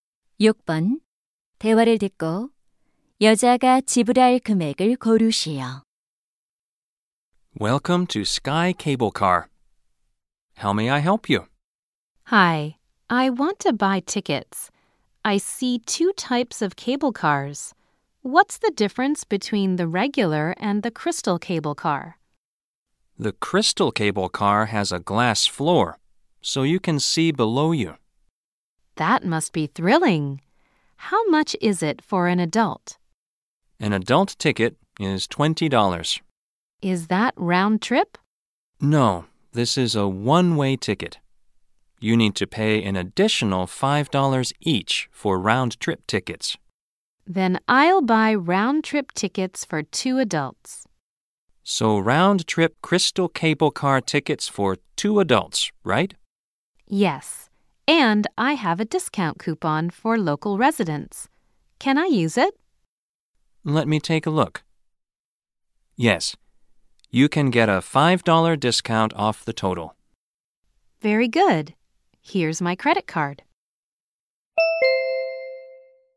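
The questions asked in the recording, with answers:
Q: 대화를 듣고 여자가 지불할 금액을 고르시오.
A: $45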